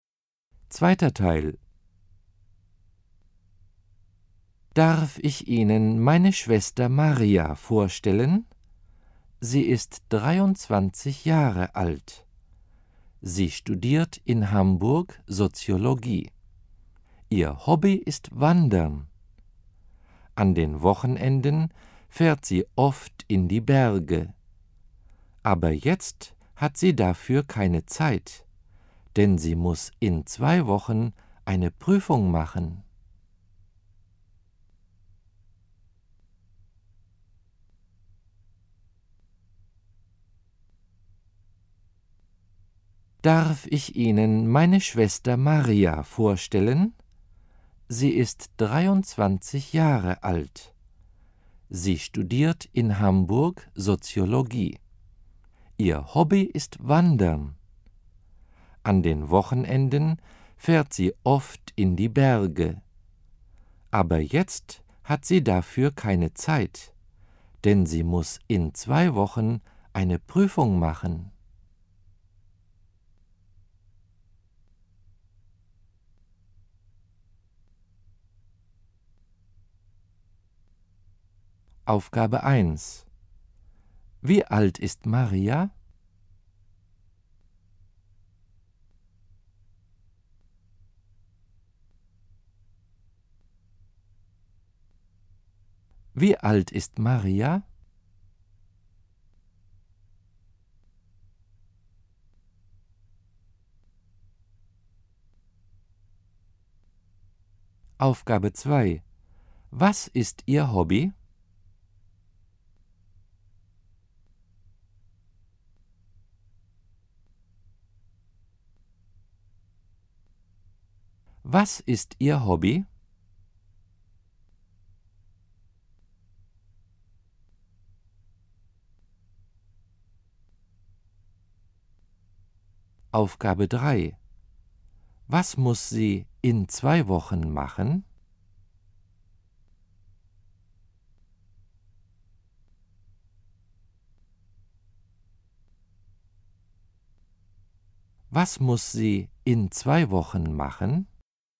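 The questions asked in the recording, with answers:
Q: Wie alt ist Maria?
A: 23 Jahre alt

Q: Was ist Ihr Hobby?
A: Wandern

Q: Was muss sie in 2 Wochen machen?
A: Eine Prüfung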